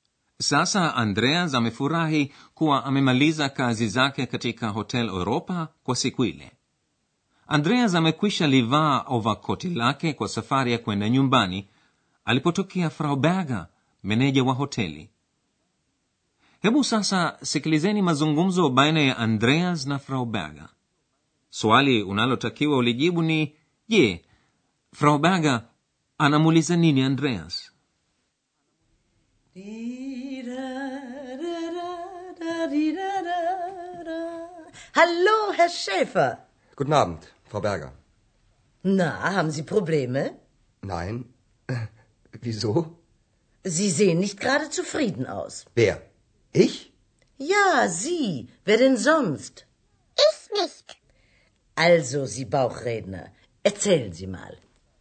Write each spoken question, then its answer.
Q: je, Frau Berger anamuuliza nini Andreas?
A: Frau Berger anamuliza Andreas kama ana matatizo.